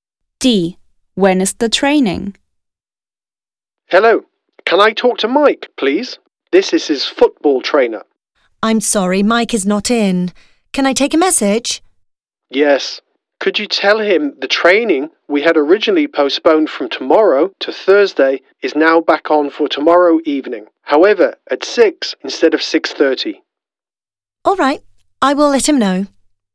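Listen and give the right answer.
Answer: Tomorrow evening at 6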